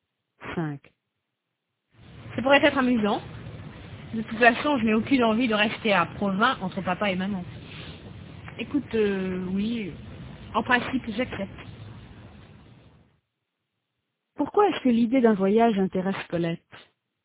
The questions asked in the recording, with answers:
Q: Pourquoi est-ce que l'idée d'un voyage intéresse Colette?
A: Parce qu'elle n'a aucune envie de rester à Provins entre papa et maman.